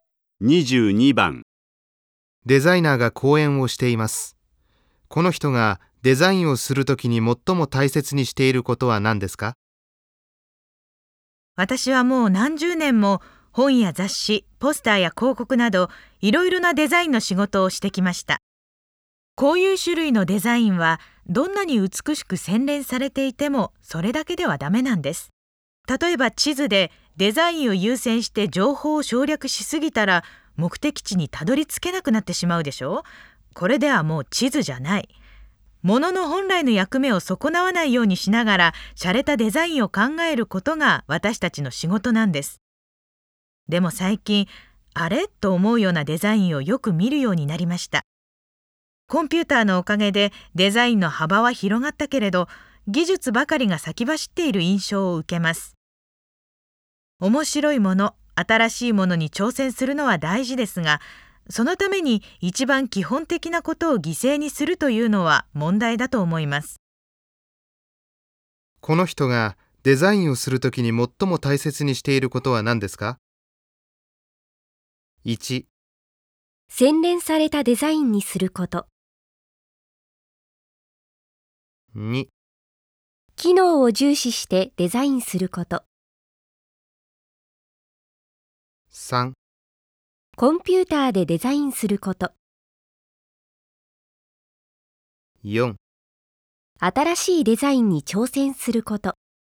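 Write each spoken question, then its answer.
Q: この人がデザインをするときに最も大切にしていることは何ですか?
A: 2: 機能を重視してデザインすること。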